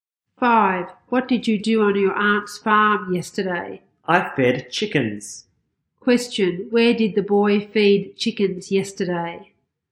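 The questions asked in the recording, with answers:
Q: Where did the boy feed chickens yesterday?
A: On his aunt's farm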